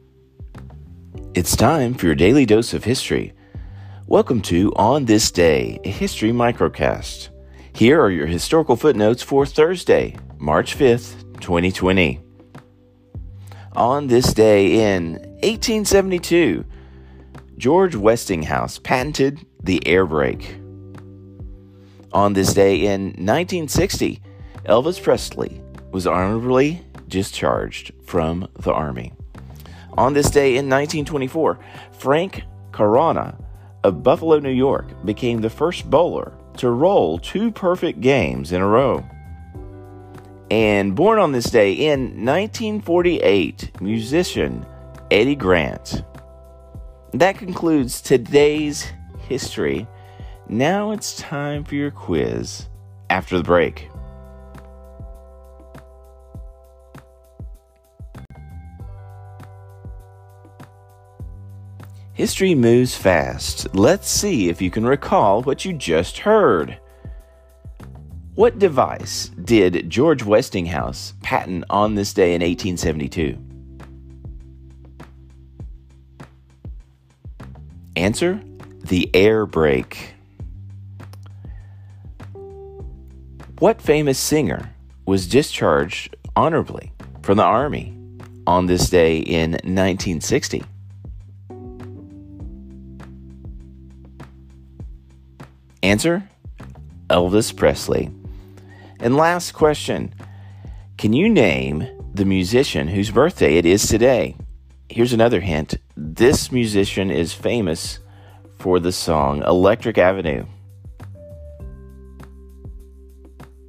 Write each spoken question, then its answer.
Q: What device did George Westinghouse patent on this day in 1872?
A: Answer, the air brake.